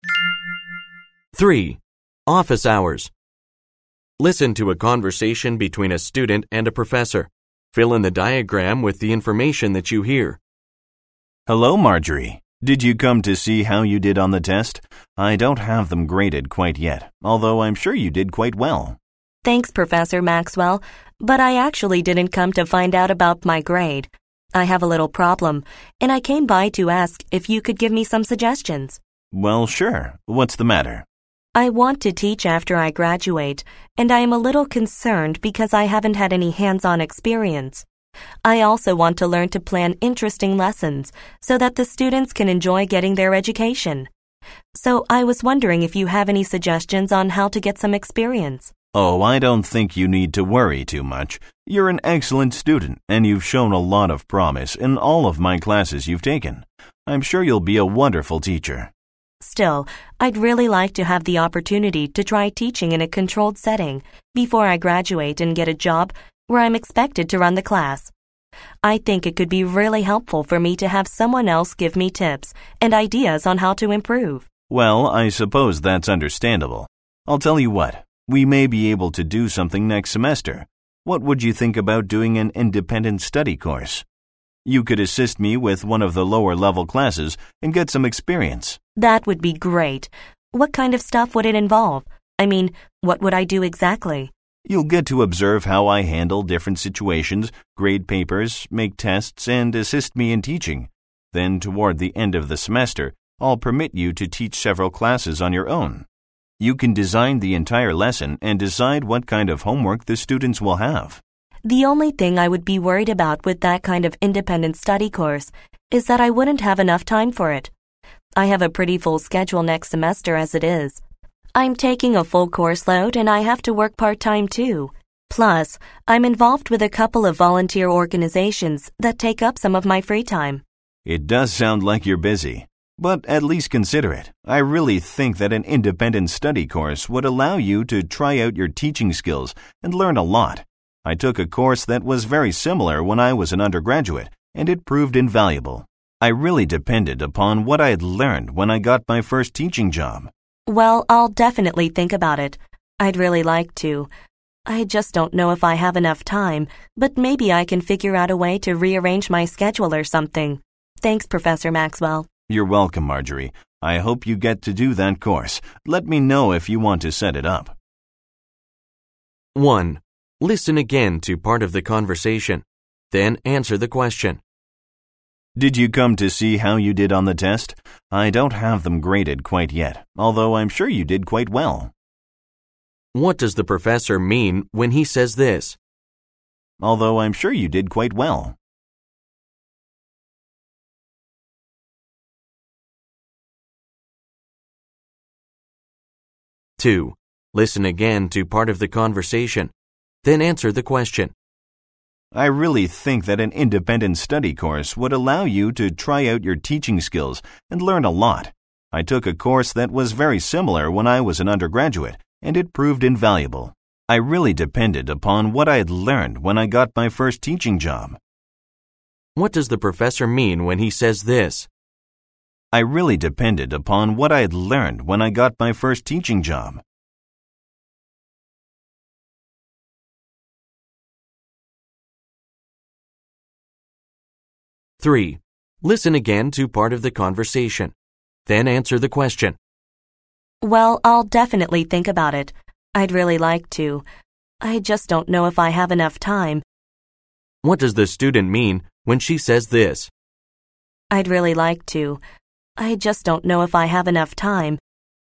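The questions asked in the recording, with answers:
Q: What does the professor mean when he says this?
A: He expects she did well on the test, even though he hasn't graded it yet

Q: What does the professor mean when he says this?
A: The similar course he took was very useful when he began teaching

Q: What does the student mean when she says this?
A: She wants to take the course but is worried she may not have time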